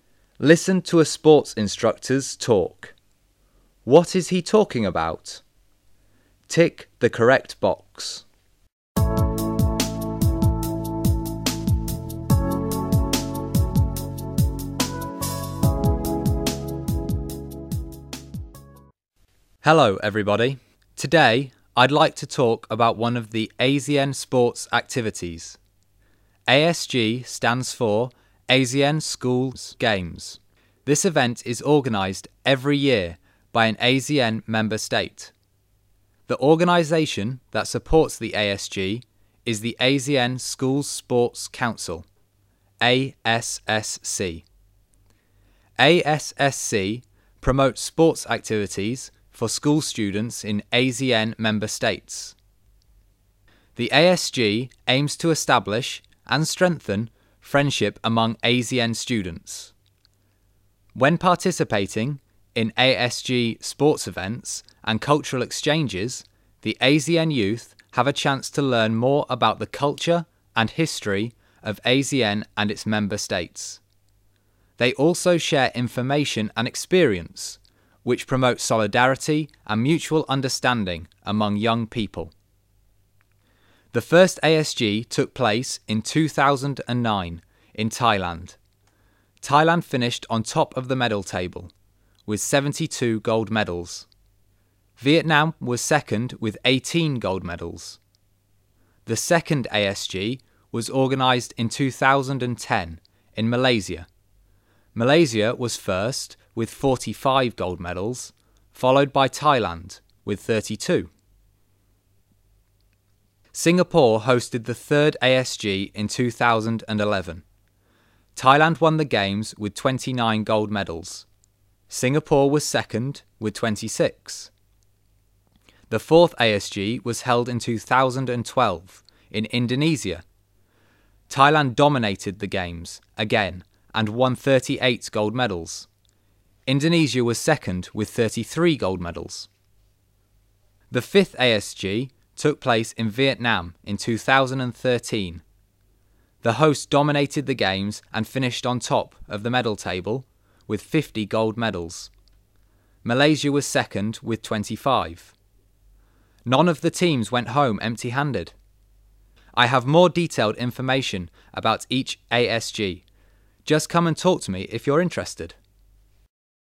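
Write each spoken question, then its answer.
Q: What is he talking about?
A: The AZN (ASEAN) Schools Games (ASG)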